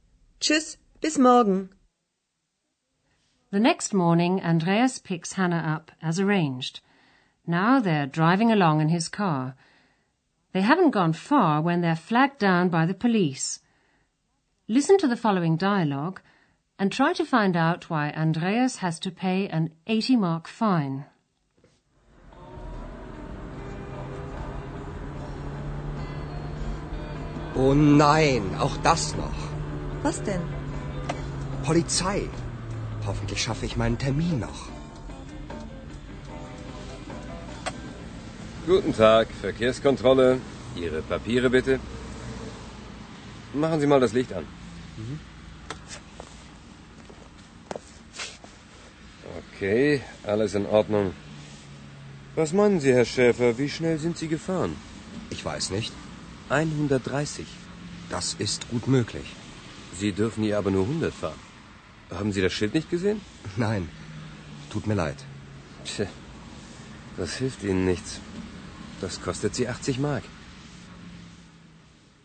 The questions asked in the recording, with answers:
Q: try to find out why Andreas has to pay an 80 mark fine.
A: Andreas has to pay an 80 mark fine because he was driving too fast.